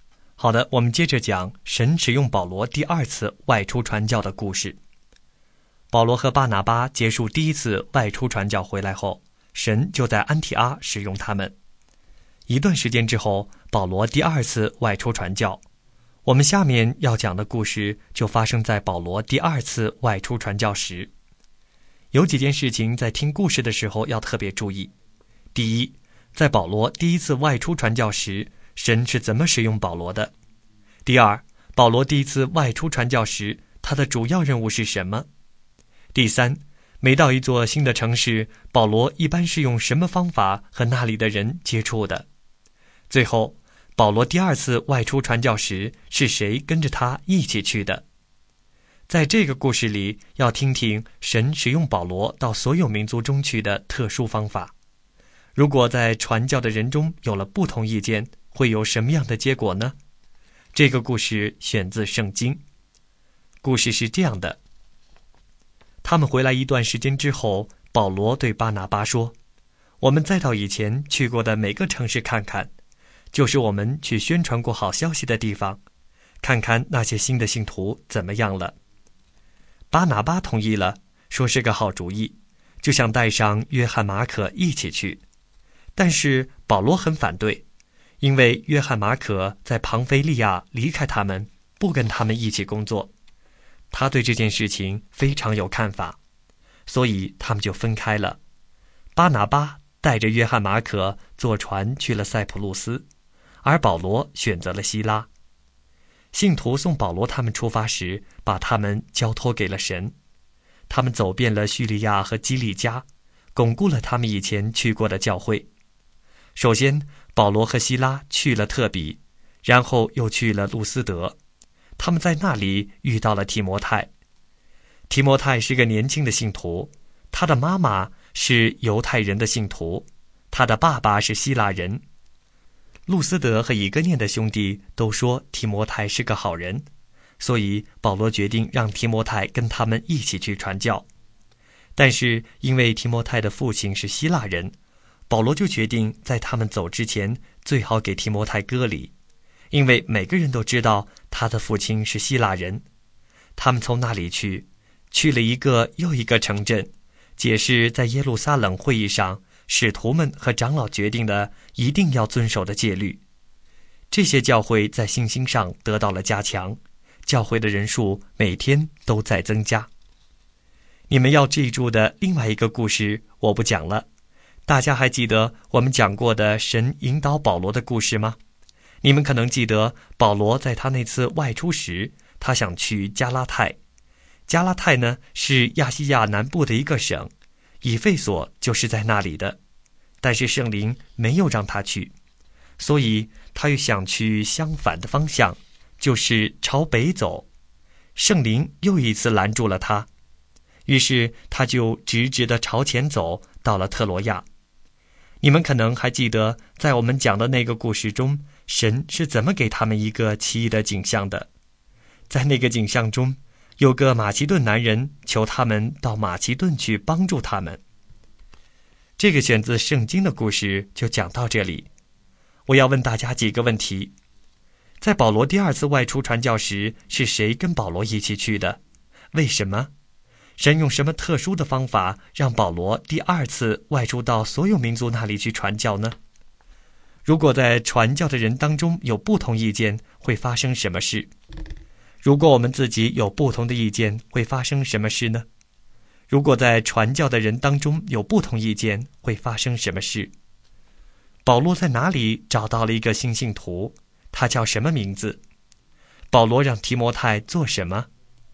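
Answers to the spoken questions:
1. 希拉(后来还有提摩太)
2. 路斯德
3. 提摩太
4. 跟他们一起去传教(并先受割礼)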